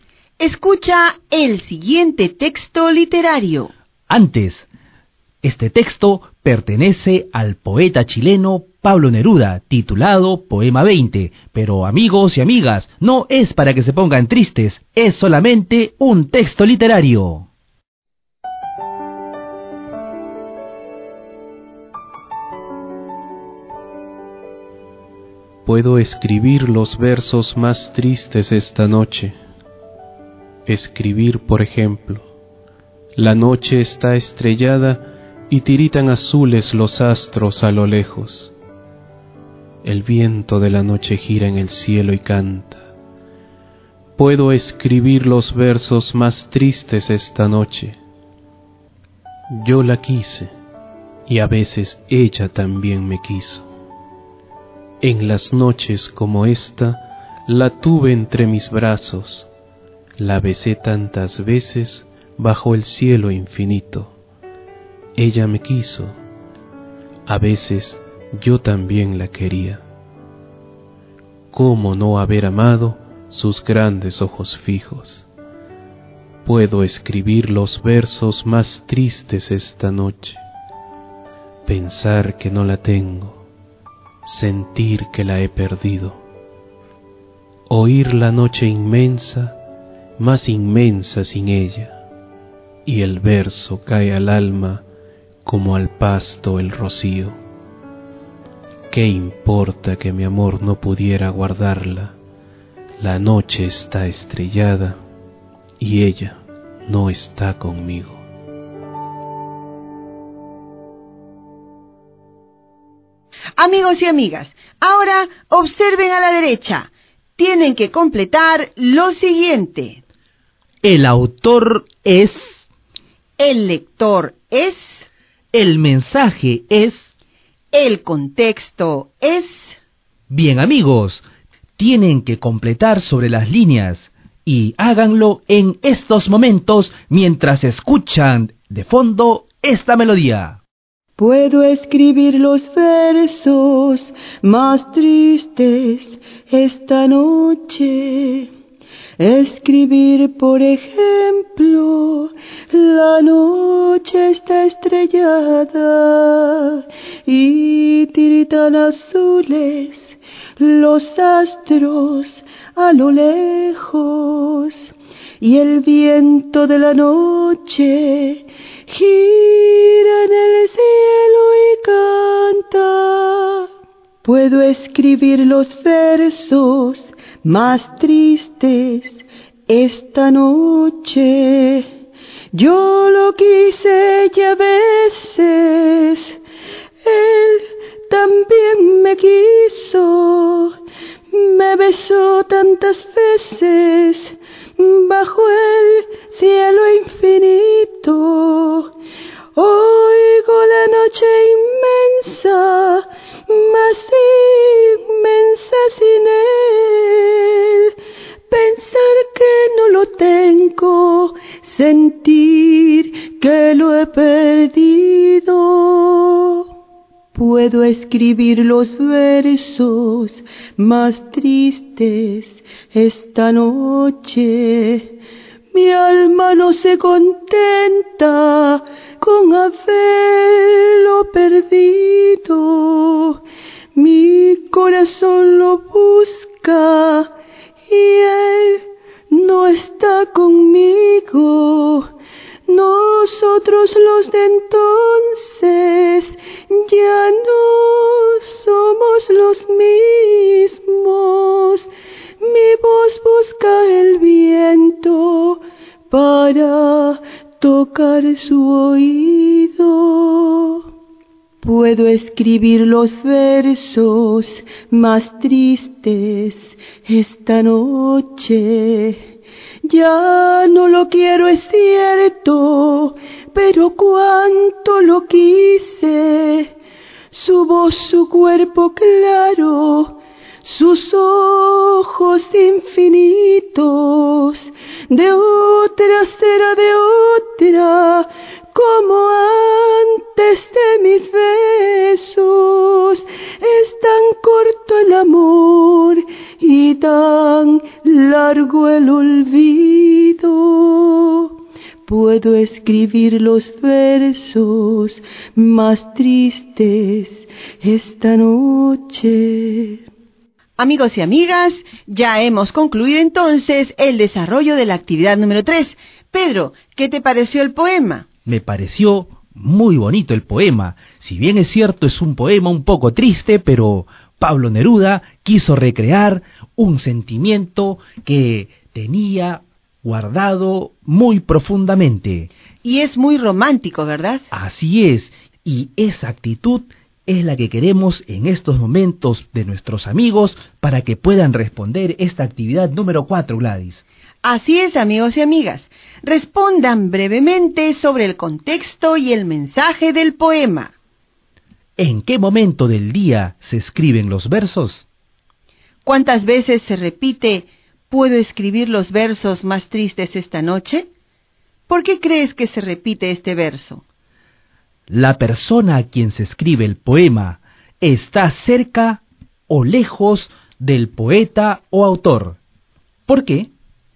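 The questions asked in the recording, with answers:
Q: ¿En qué momento del día se escriben los versos?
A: De noche

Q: ¿La persona a quien se escribe el poema está cerca o lejos del poeta o autor?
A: Lejos: ella no está con él, la ha perdido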